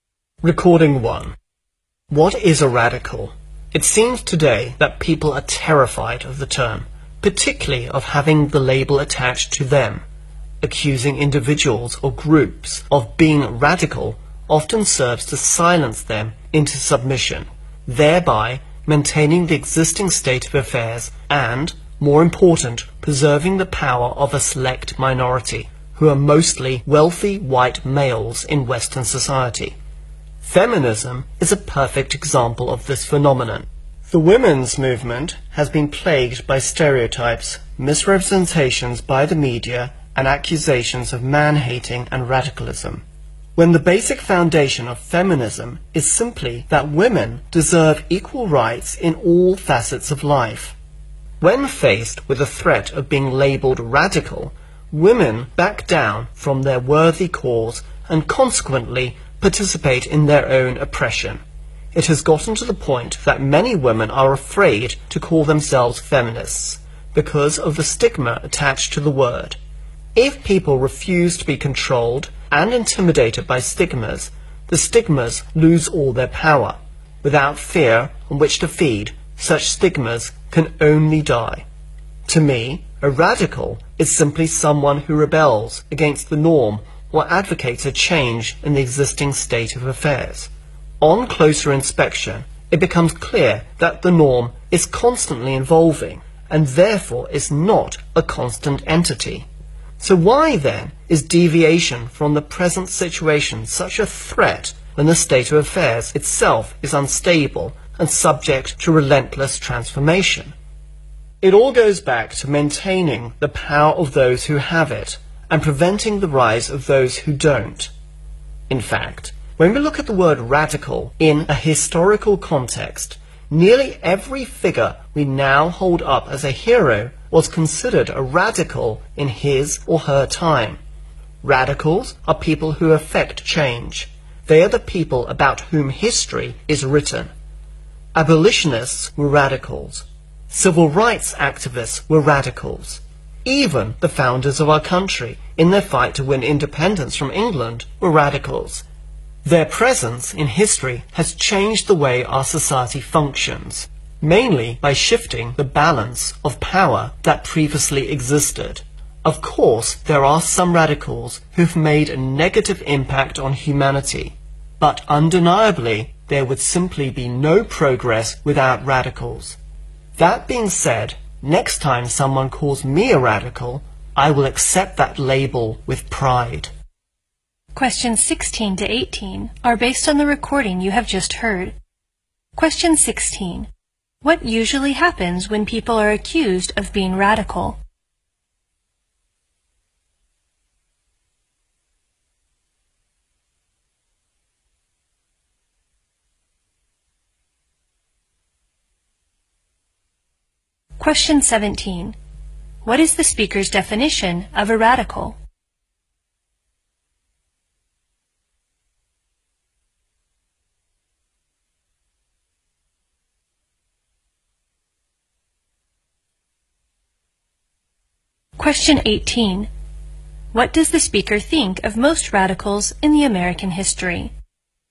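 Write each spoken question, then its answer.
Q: What usually happens when people are accused of being radical?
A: They are silenced into submission.

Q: What is the speaker's definition of a radical?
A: Someone who rebels against the norm or pushes for change in the existing state of affairs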